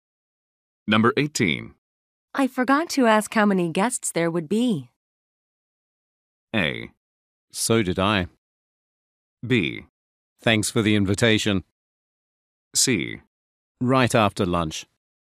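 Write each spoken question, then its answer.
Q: I forgot to ask how many guests there would be.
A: A: So did I.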